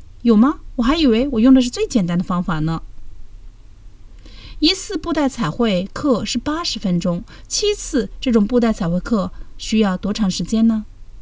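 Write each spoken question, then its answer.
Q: 一次布袋彩绘课是80分钟,七次这种布袋彩绘课需要多长时间呢?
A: 560分钟(9小时20分钟)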